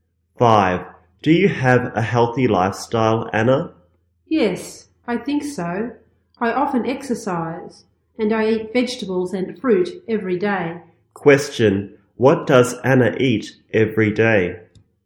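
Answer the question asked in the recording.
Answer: Vegetables and fruit.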